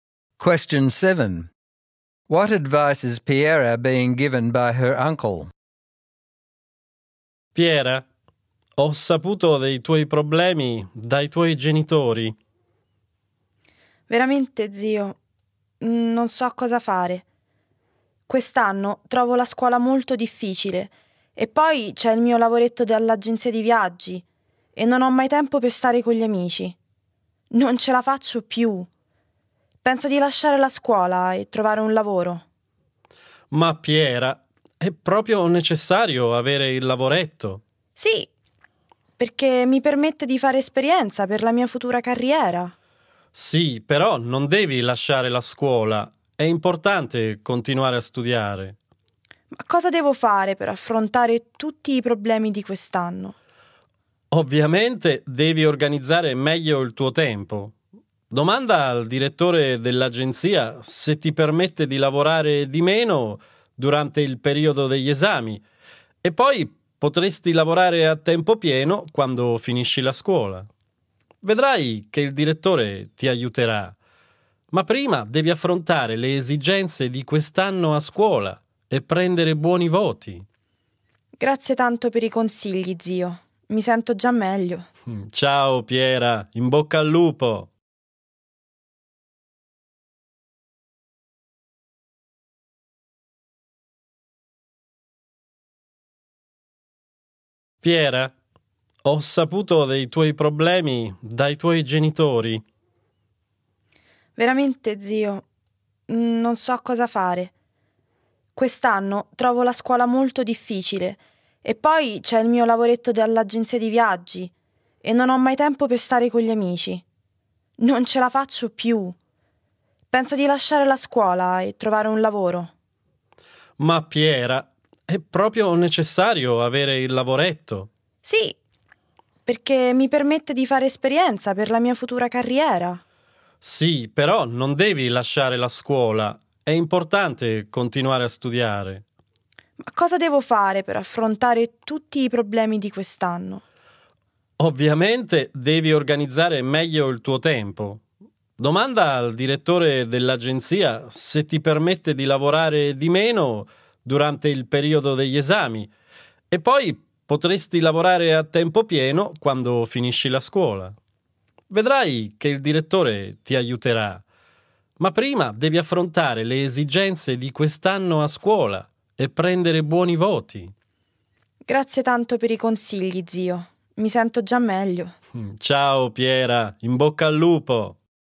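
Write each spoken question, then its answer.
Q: What advice is Piera being given by her uncle?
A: Not to leave school but to keep studying and organise her time better. She should ask the agency director whether she can work less during exams, then work full-time after she finishes school, and for now focus on getting good marks.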